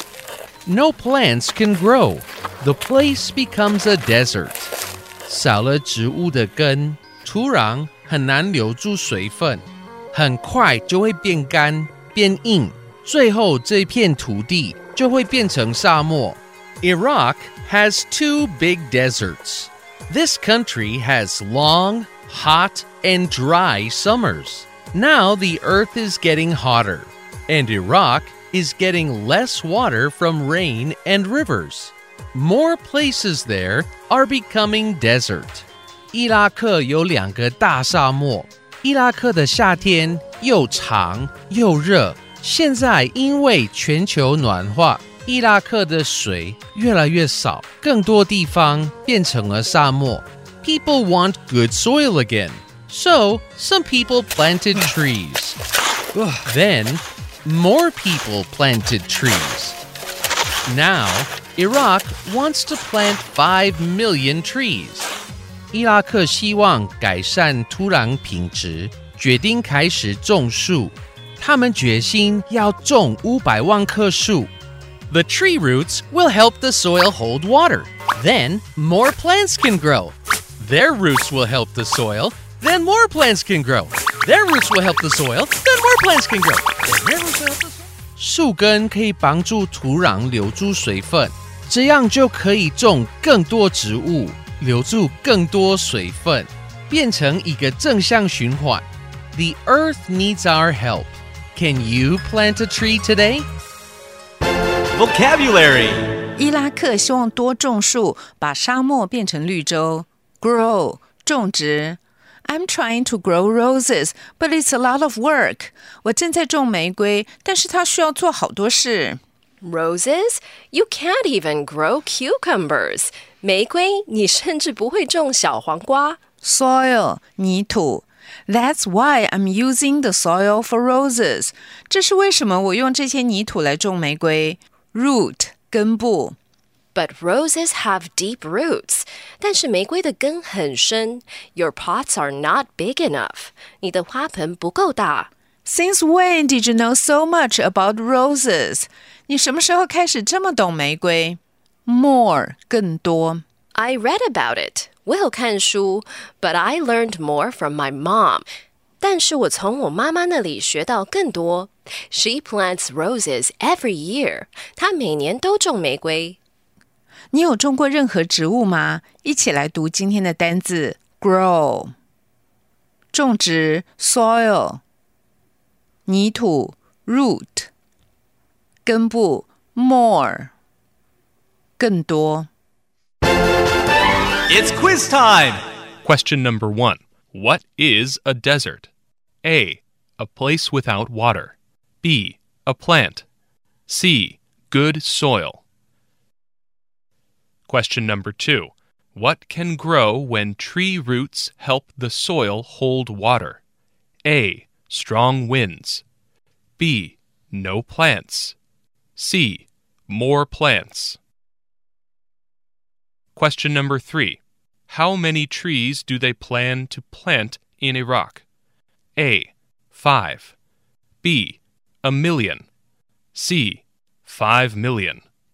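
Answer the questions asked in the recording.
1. A: A place without water.
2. C: More plants.
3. C: 5 million.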